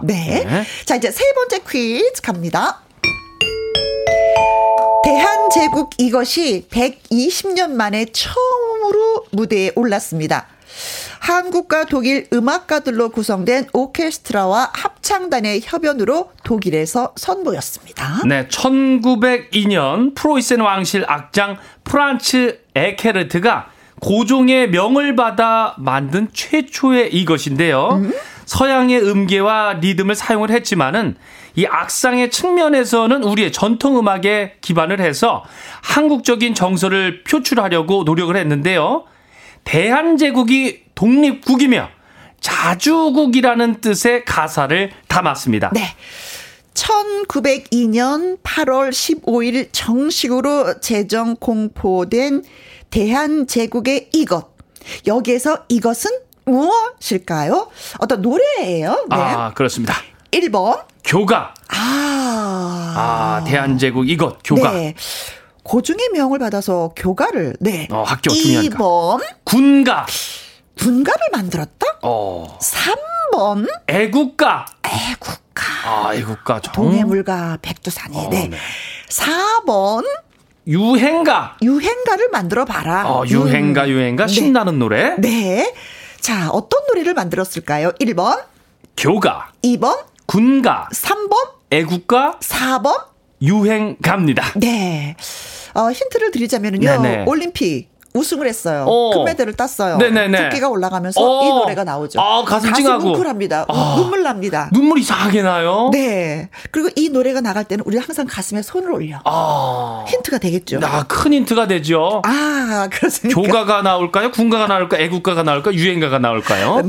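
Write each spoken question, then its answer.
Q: 자, 어떤 노래를 만들었을까요?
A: 3: 애국가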